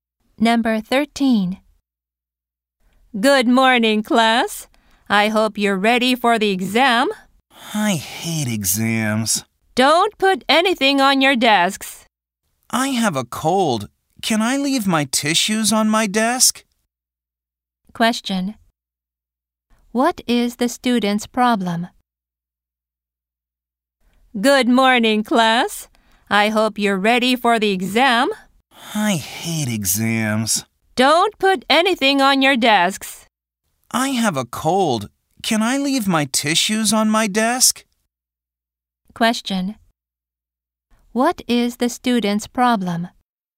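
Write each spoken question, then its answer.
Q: What is the student's problem?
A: He has a cold.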